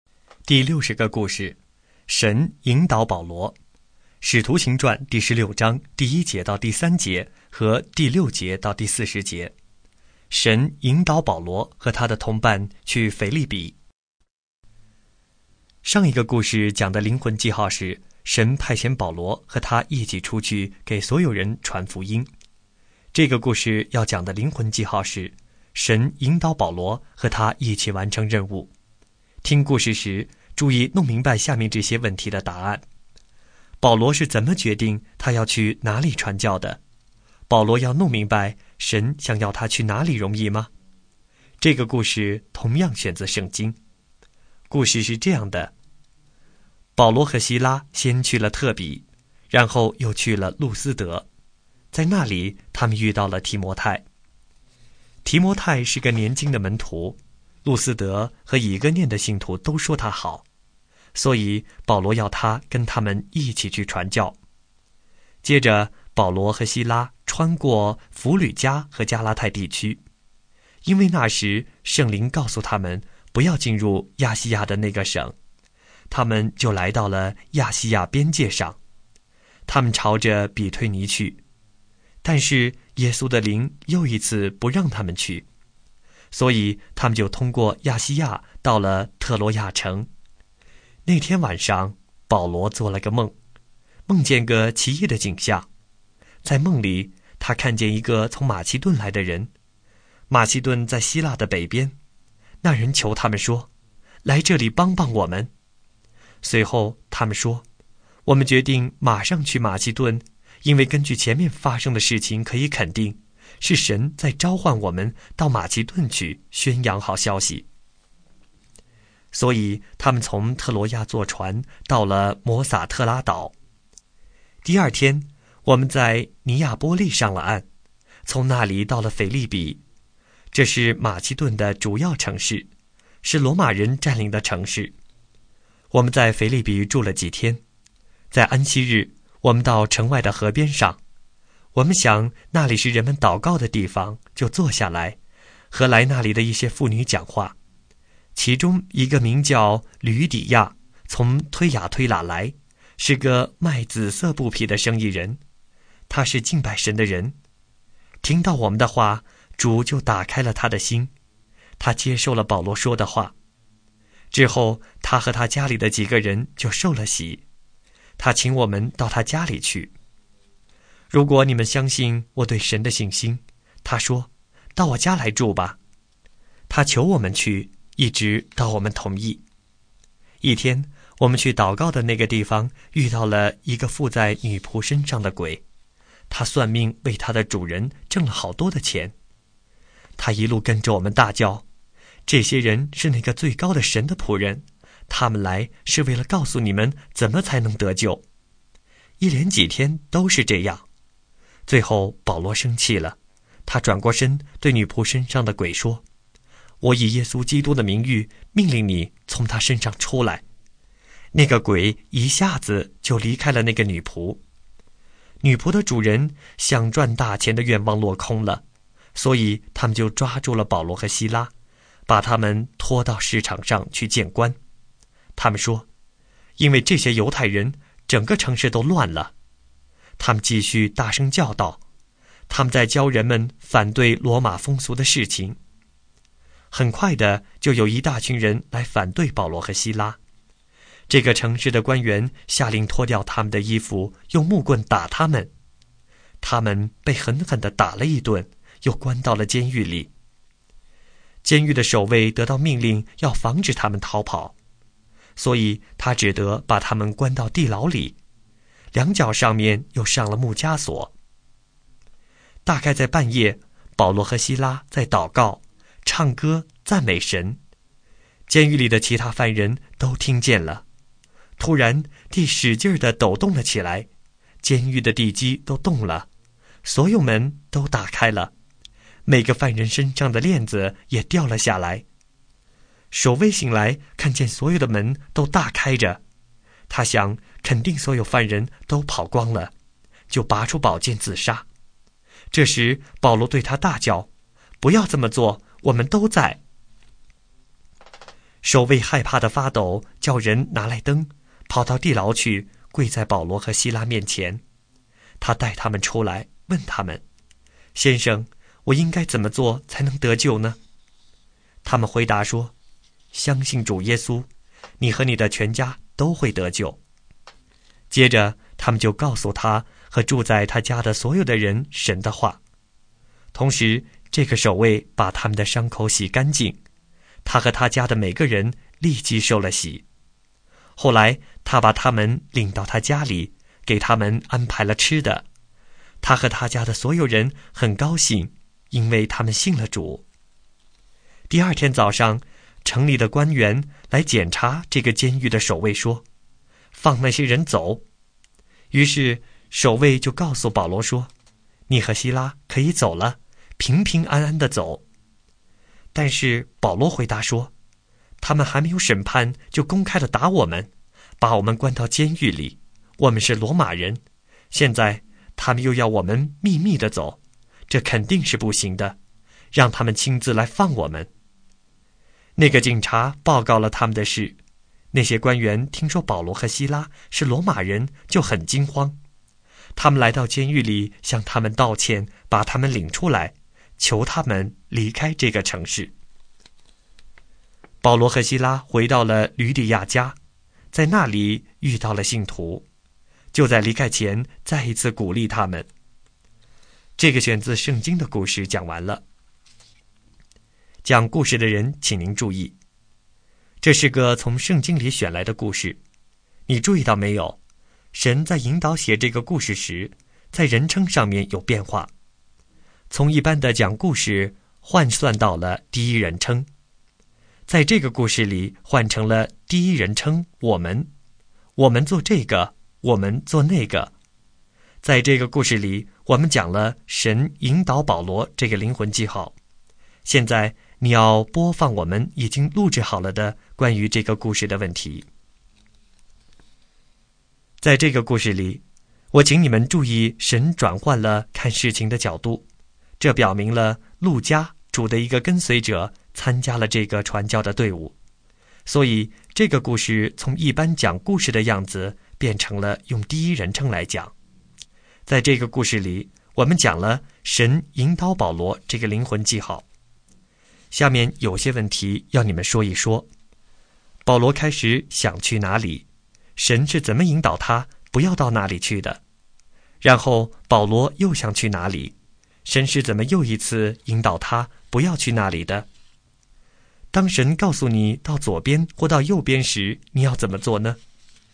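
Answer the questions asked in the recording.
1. 亚细亚省
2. 圣灵告诉他们不要进入亚细亚省
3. 比推尼
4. 耶稣的灵不让他们去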